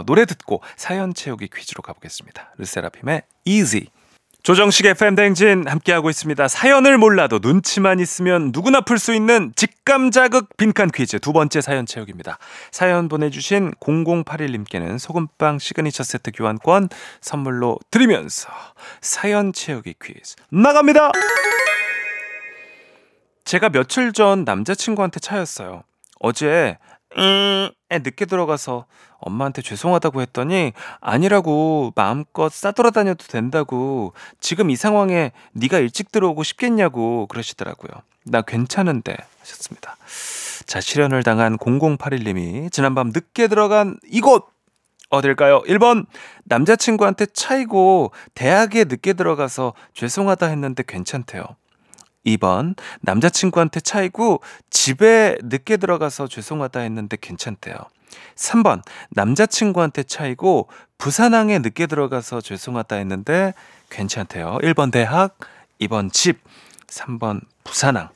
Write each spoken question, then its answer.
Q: 실연을 당한 0081님이 지난밤 늦게 들어간 이곳 어딜까요?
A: 정답은 2번 집입니다.